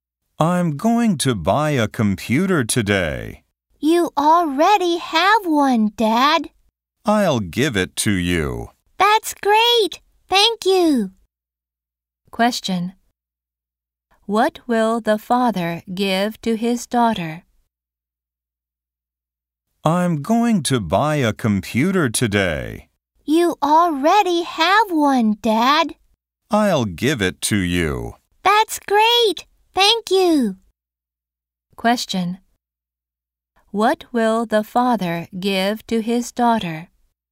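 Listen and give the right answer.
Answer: His (old) computer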